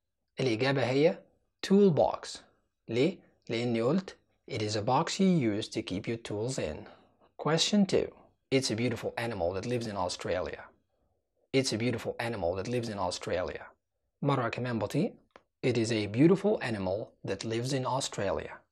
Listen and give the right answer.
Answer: الإجابة هي kangaroo.